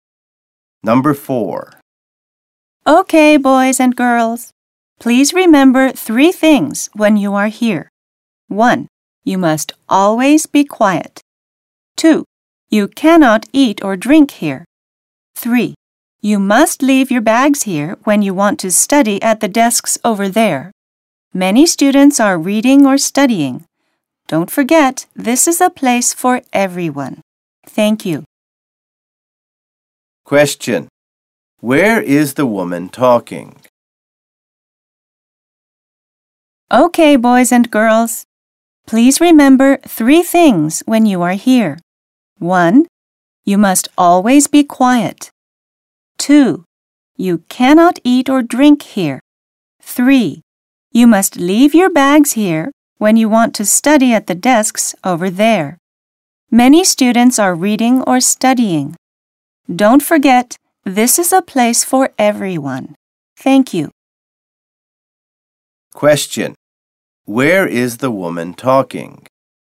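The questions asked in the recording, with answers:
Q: Where is the woman talking?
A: In a library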